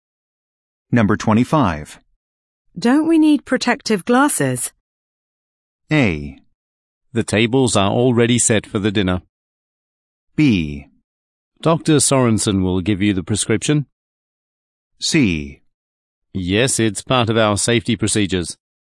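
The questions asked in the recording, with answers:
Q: Don't we need protective glasses?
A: C: Yes, it's part of our safety procedures.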